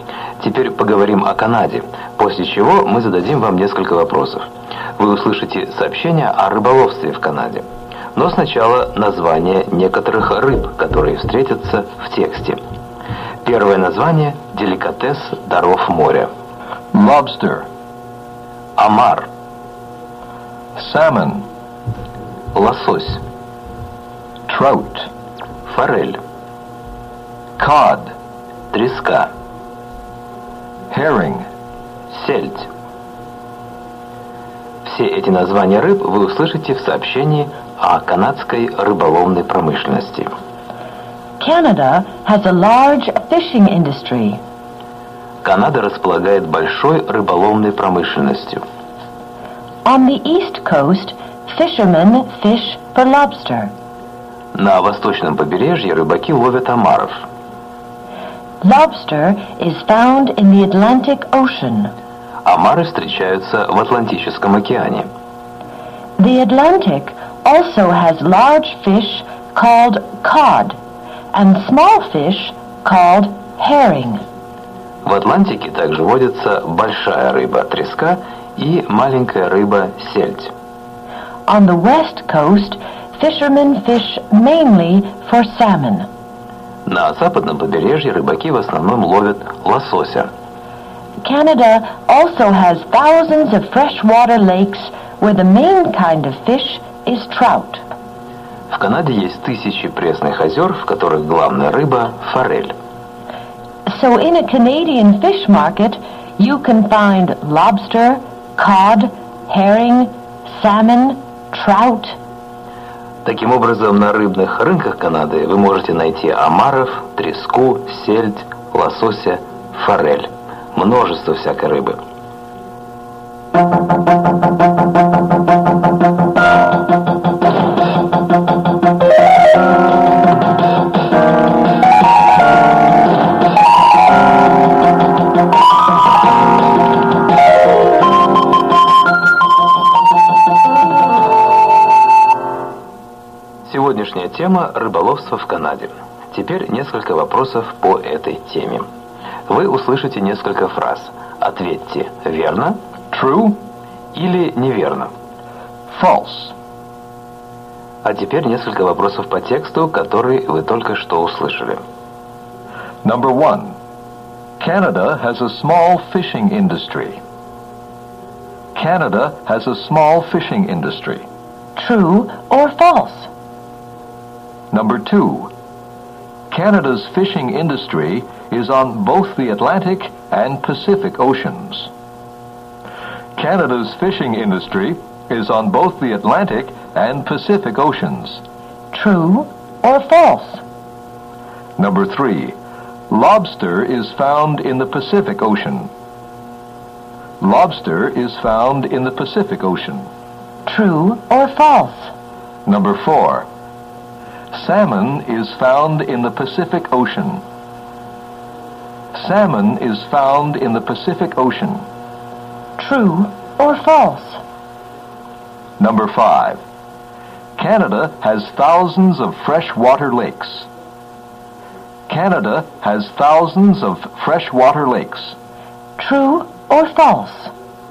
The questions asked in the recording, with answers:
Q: Canada has a small fishing industry.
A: False.

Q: Canada's fishing industry is on both the Atlantic and Pacific Oceans.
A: True.

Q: Lobster is found in the Pacific Ocean.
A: False.

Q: Salmon is found in the Pacific Ocean.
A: True.

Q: Canada has thousands of freshwater lakes.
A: True.